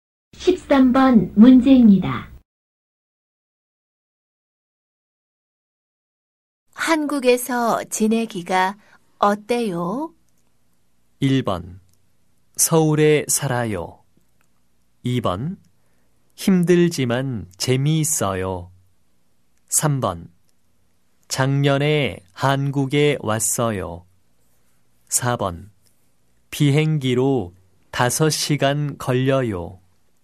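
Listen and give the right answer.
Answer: 2: 힘들지만 재미있어요.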